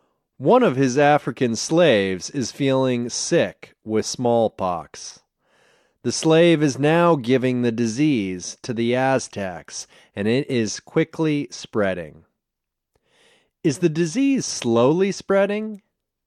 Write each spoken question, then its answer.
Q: Is the disease slowly spreading?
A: No, it's not slowly spreading, it's quickly spreading.